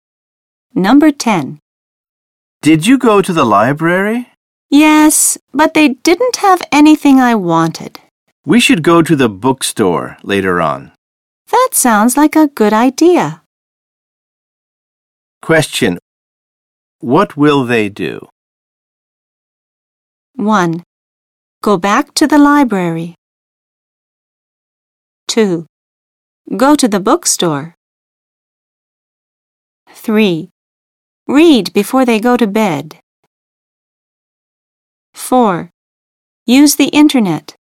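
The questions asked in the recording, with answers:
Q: What will they do?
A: 2: Go to the bookstore.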